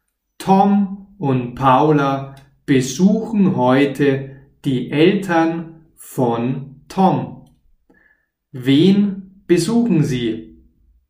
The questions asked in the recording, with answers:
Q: Wen besuchen sie?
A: Die Eltern von Tom. Sie besuchen die Eltern von Tom.